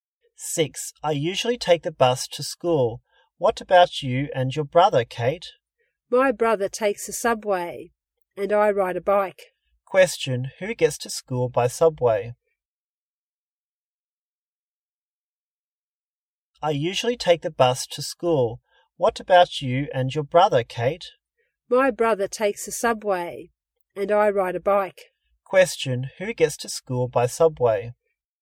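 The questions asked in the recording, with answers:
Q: who gets to school by subway?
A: Kate's brother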